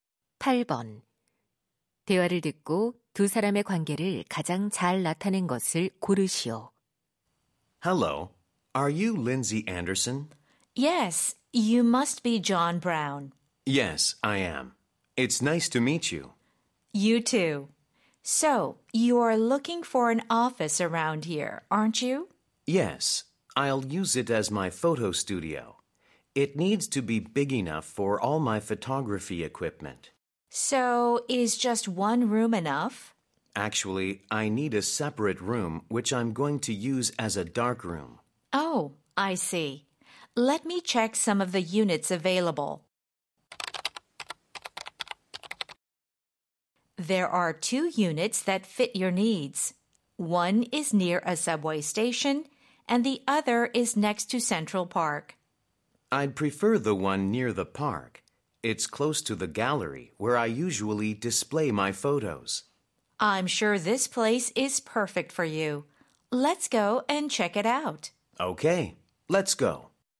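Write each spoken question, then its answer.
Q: 대화를 듣고 두 사람의 관계를 가장 잘 나타낸 것을 고르시오.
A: 사진작가 - 부동산 중개인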